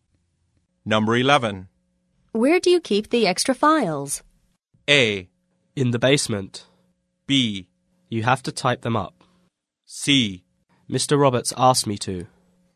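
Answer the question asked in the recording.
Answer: A: In the basement.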